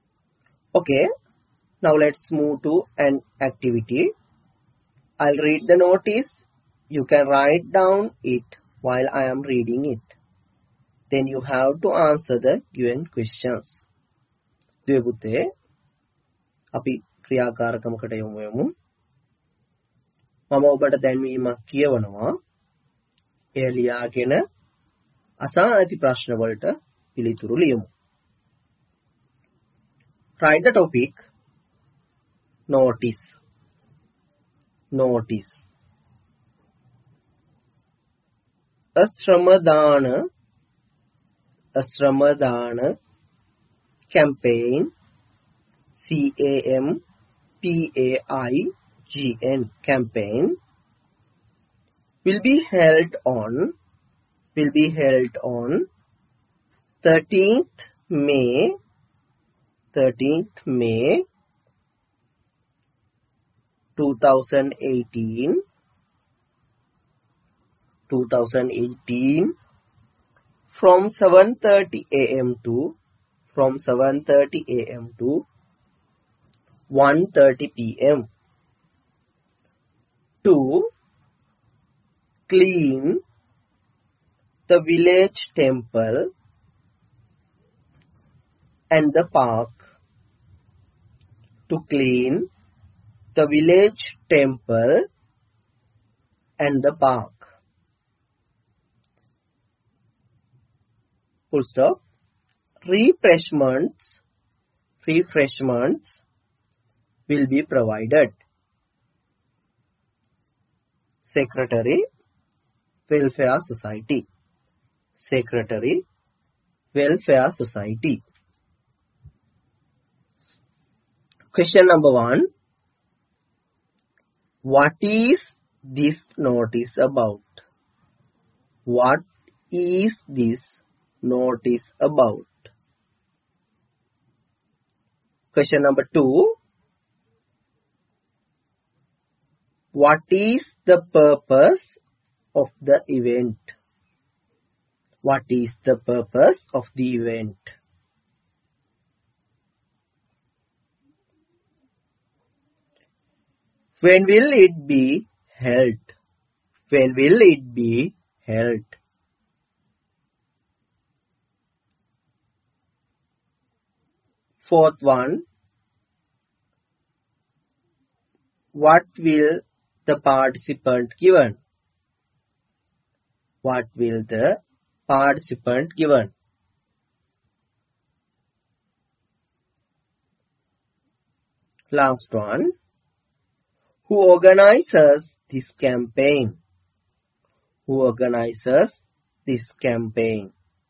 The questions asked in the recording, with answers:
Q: What is this notice about?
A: about the Shramadana campaign.

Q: What is the purpose of the event?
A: To clean the village temple.

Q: When will it be held?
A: On 13th May.

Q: What will the participant given?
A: Answer is refreshments.

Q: Who organizes this campaign?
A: Welfare Society.